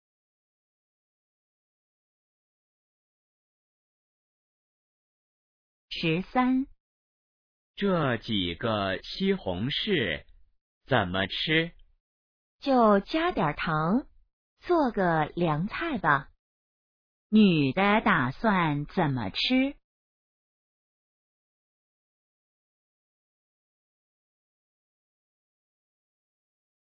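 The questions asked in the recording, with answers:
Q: 女的打算怎么吃?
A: 加点糖做凉菜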